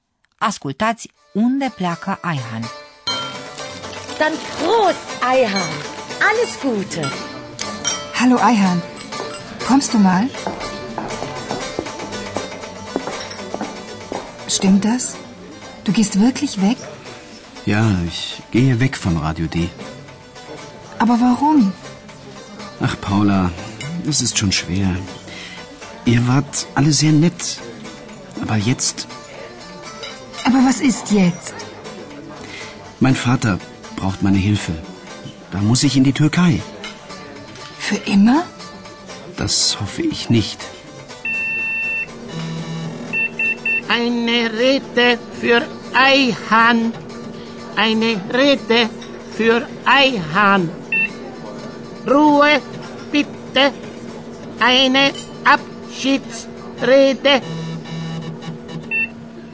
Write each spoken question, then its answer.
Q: Ascultați unde pleacă Aihan.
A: Aihan trebuie să se înapoieze la tatăl său în Turcia.